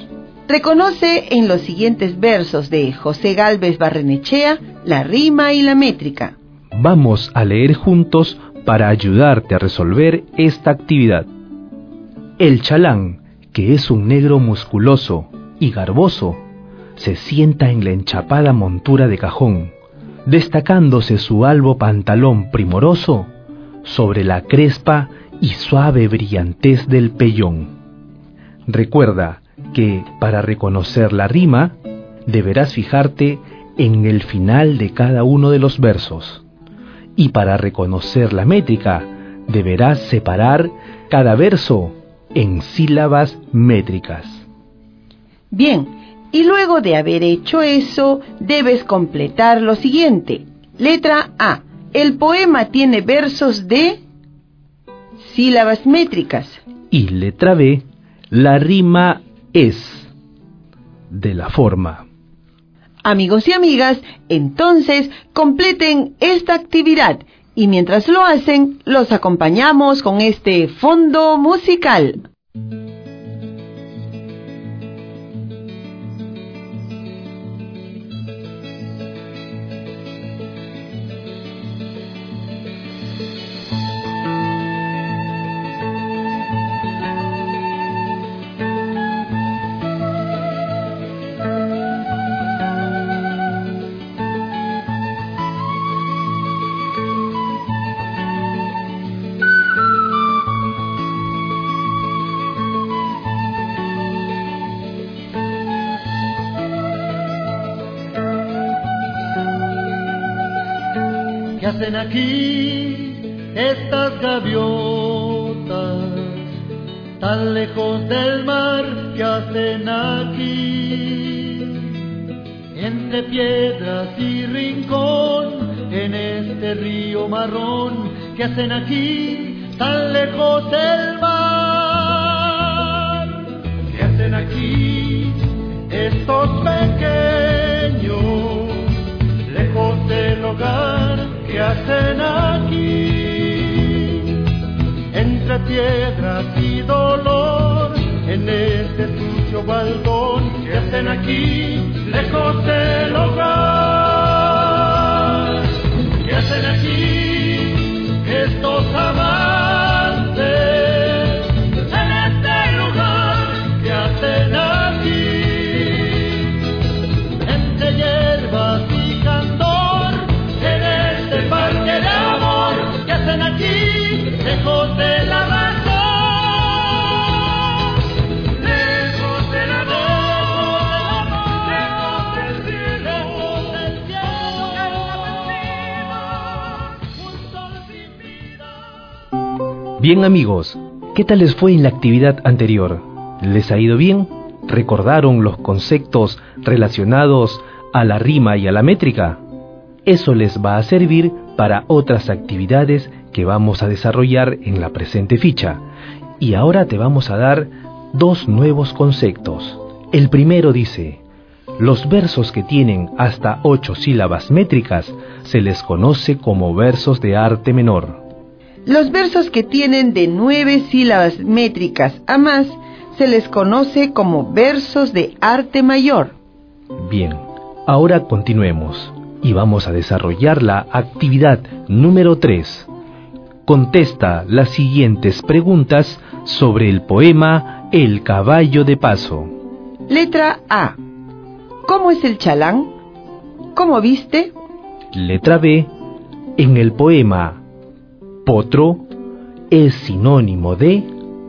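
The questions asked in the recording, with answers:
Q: Letra A. ¿Cómo es el chalán?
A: Es un negro musculoso y garboso; viste un albo pantalón primoroso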